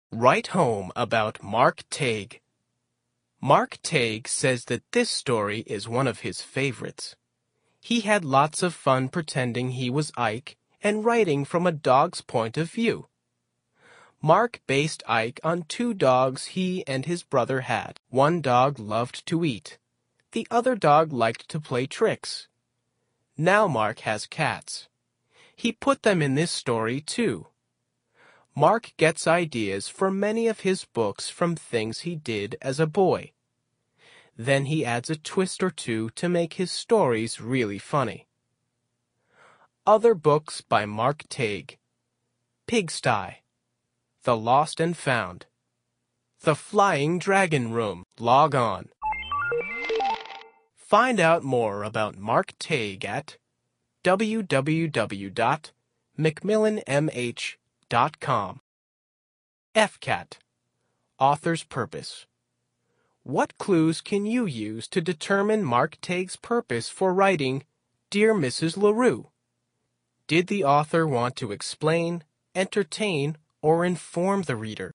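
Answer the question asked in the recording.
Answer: entertain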